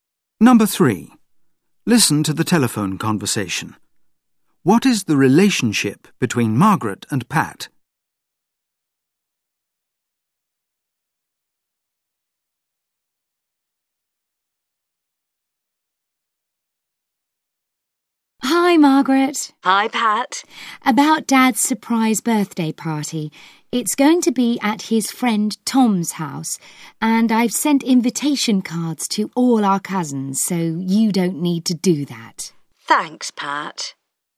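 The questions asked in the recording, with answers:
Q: What is the relationship between Margaret and Pat?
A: They are siblings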